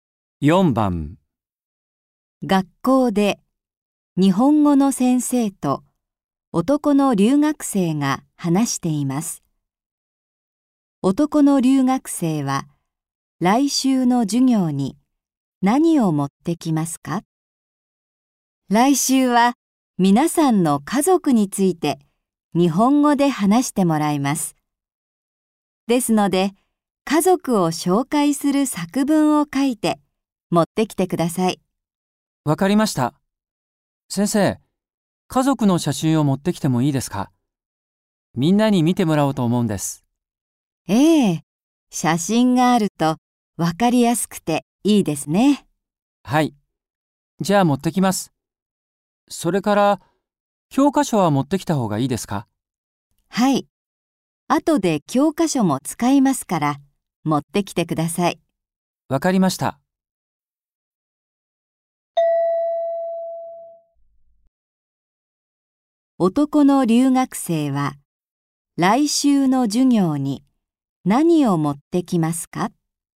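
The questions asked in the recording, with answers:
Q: 男の留学生は、来週の授業に何を持ってきますか?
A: 家族を紹介する作文と家族の写真と教科書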